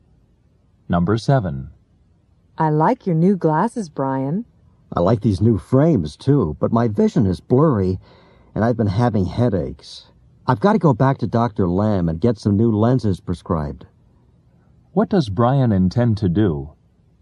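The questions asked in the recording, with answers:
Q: What does Brian intend to do?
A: Go back to Dr. Lamb to get new lenses prescribed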